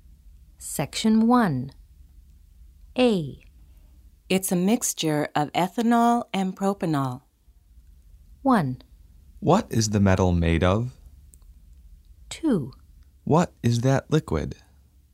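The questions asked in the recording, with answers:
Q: It's a mixture of ethanol and propanol.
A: 2: What is that liquid?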